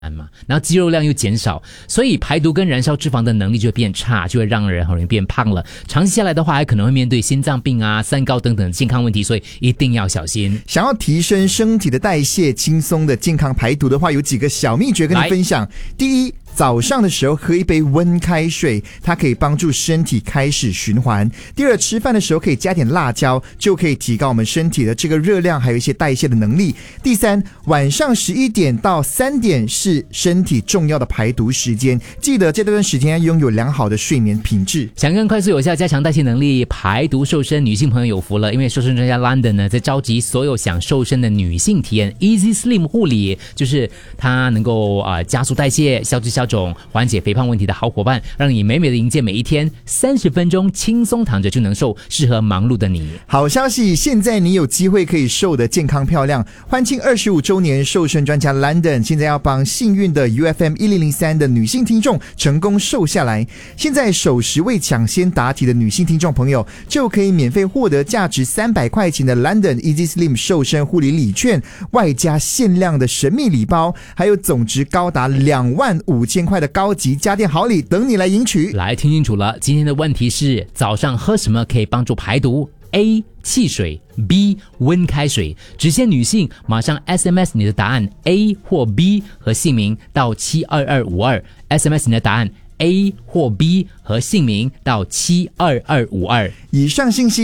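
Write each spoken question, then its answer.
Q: 早上喝什么可以帮助排毒 ?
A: B: 温开水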